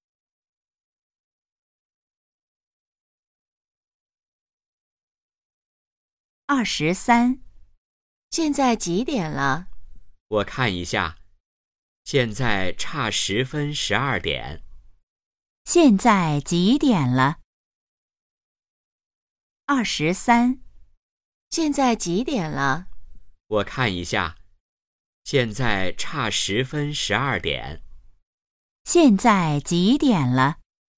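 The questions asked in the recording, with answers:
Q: 现在几点了?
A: 十一点五十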